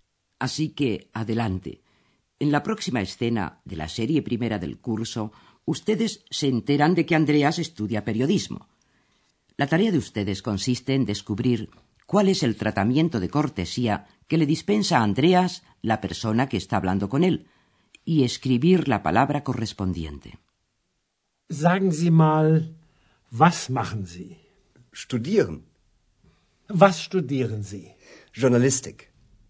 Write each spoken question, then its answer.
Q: La tarea de ustedes consiste en descubrir cuál es el tratamiento de cortesía que le dispensa a Andreas la persona que está hablando con él y escribir la palabra correspondiente.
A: En primer lugar, se buscó la fórmula de cortesía, que en alemán es Sie, usted.